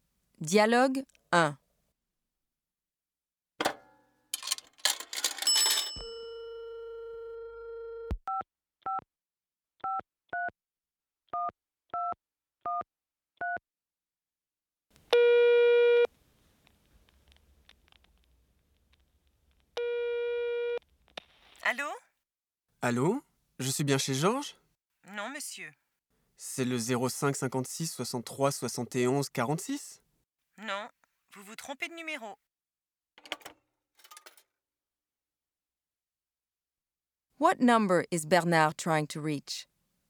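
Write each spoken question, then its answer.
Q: What number is Bernard trying to reach?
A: 05 56 63 71 46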